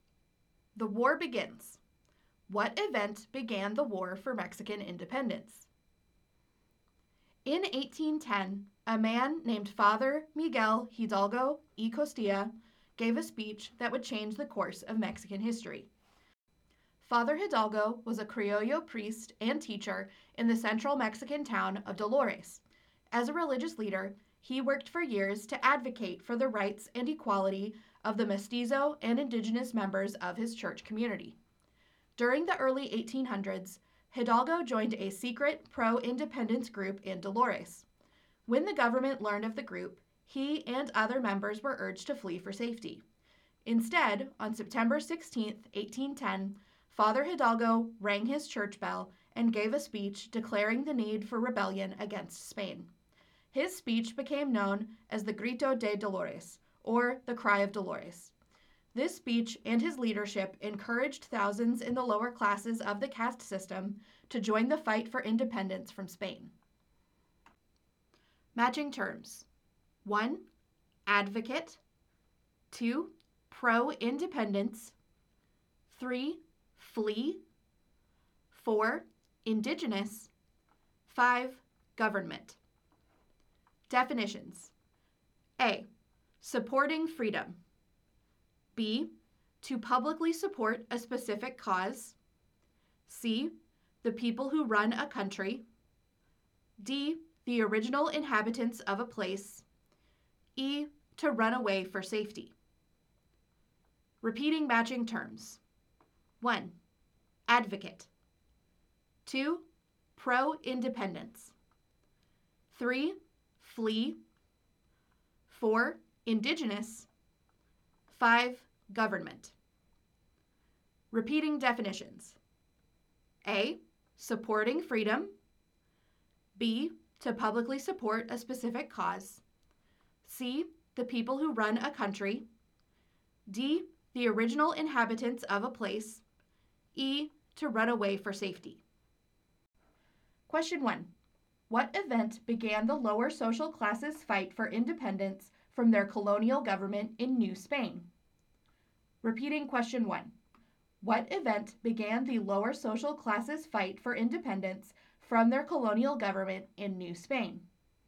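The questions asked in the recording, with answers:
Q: What event began the lower social classes' fight for independence from their colonial government in New Spain?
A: Father Hidalgo's speech, the Grito de Dolores (Cry of Dolores), on September 16, 1810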